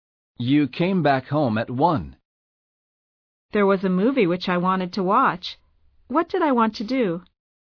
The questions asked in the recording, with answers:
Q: What did I want to do?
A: You wanted to watch a movie.